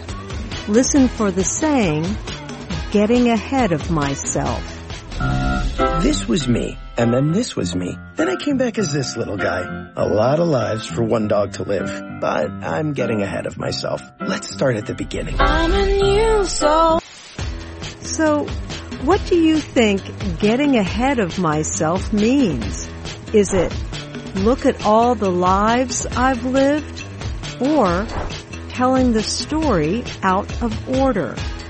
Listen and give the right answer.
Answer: Getting ahead of myself means telling the story out of order.